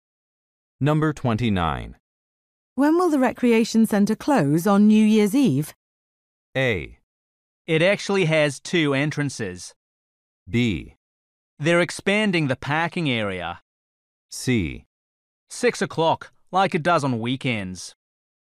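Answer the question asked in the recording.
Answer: C: 6 o'clock, like it does on weekends.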